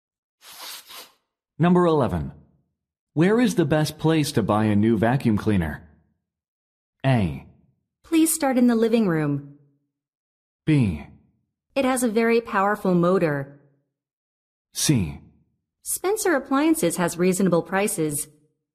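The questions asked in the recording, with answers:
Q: Where is the best place to buy a new vacuum cleaner?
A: C: Spencer Appliances has reasonable prices.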